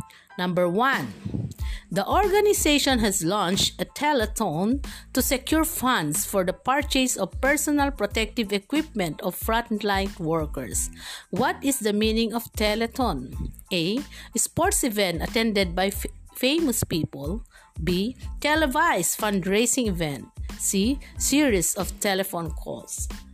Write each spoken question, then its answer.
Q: What is the meaning of telethon?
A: Yes, letter B. A televised fundraising event.